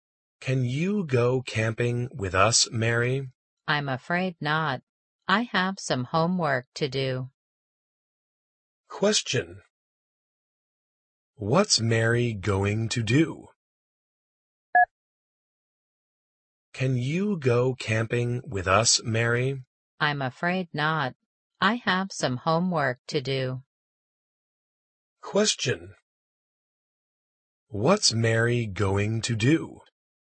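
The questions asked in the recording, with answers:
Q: What's Mary going to do?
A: Do her homework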